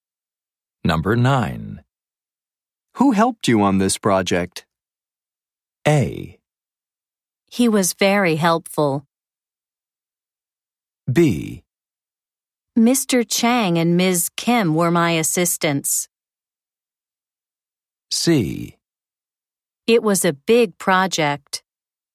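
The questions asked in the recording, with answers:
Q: Who helped you on this project?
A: B: Mr. Chang and Ms. Kim were my assistants.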